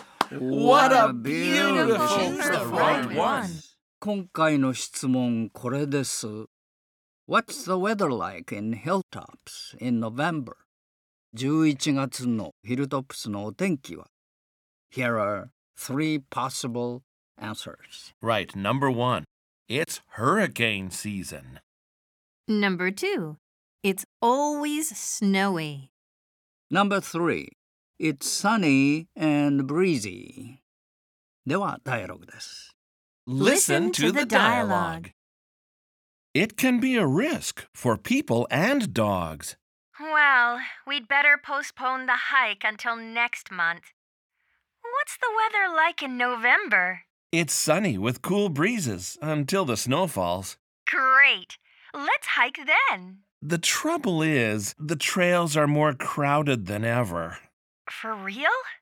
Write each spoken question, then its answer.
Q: What's the weather like in Hilltops in November?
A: Number three, it's sunny and breezy.